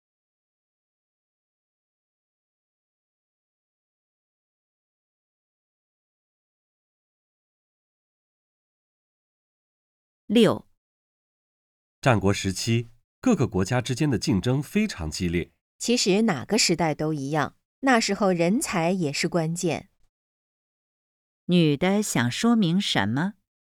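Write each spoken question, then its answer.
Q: 女的想说明什么?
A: 哪个时代人才都是关键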